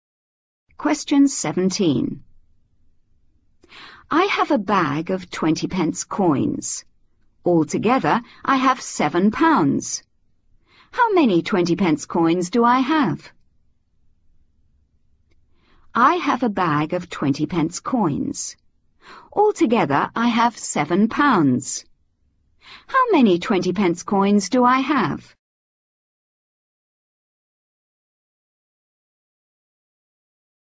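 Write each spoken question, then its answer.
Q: Altogether, I have £7. How many 20 pence coins do I have?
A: 35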